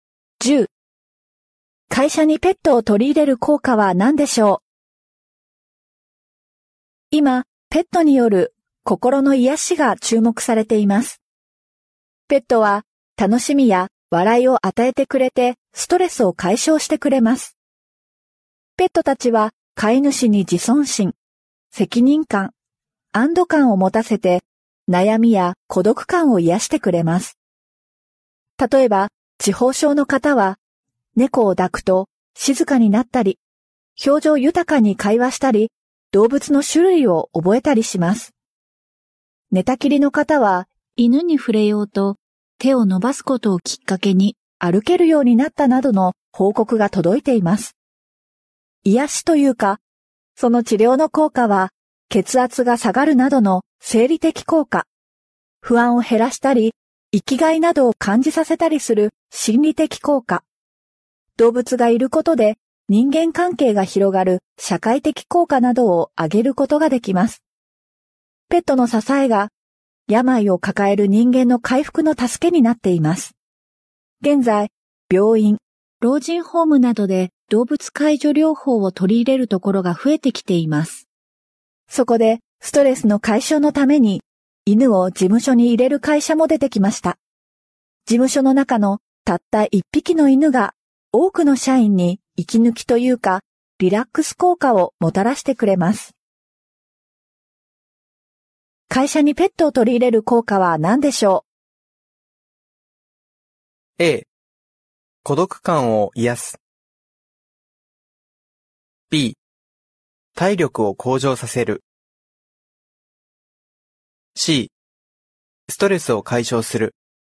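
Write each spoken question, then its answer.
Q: 会社にペットを取り入れる効果は何でしょう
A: C: ストレスを解消する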